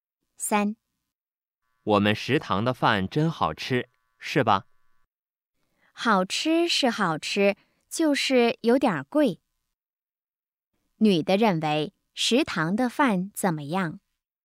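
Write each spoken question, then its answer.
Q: 女的认为食堂的饭怎么样?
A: 好吃,但是有点贵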